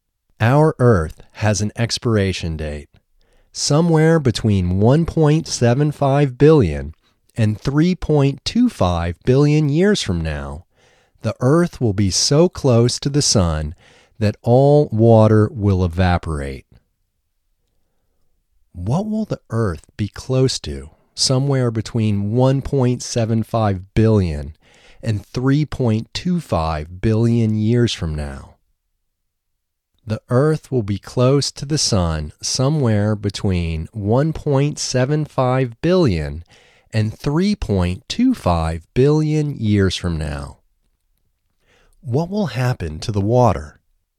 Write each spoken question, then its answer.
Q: What will the Earth be close to somewhere between 1.75 billion and 3.25 billion years from now?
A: The Earth will be close to the Sun somewhere between 1.75 billion and 3.25 billion years from now.

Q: What will happen to the water?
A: The water will evaporate, and no water means no life.